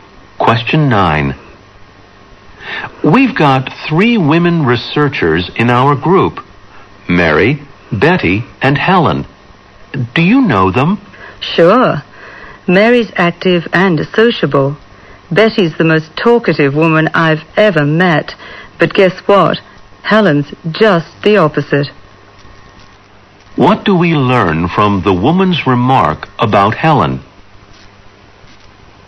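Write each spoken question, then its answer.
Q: What do we learn from the woman's remark about Helen?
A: Helen is quiet; she doesn't talk much.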